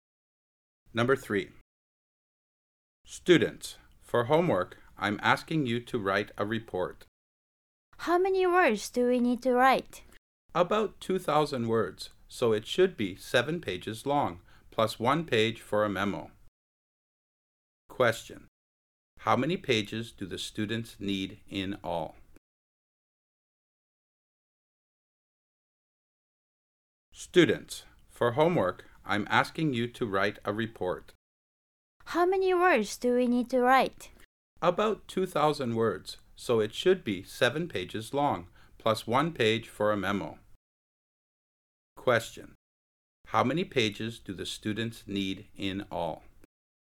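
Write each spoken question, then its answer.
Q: How many pages do the students need in all?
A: Eight pages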